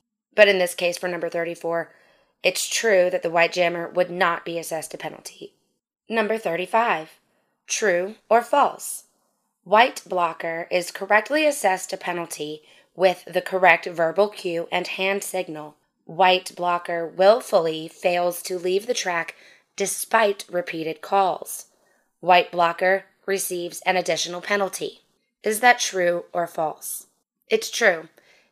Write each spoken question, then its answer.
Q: White blocker receives an additional penalty.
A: It's true.